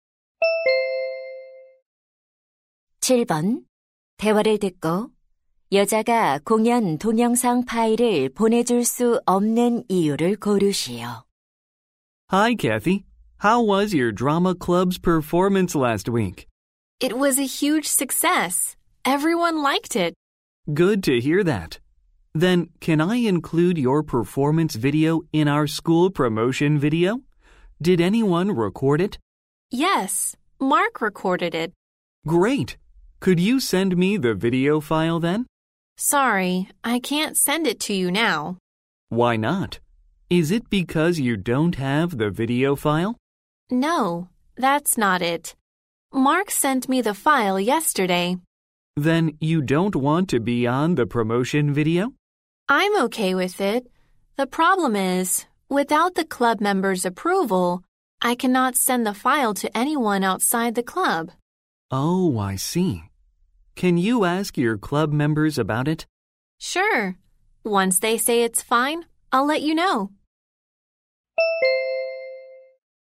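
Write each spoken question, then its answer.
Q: 대화를 듣고 여자가 공연 동영상 파일을 보내줄 수 없는 이유를 고르시오.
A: 동아리 회원들의 승인을 받지 않아서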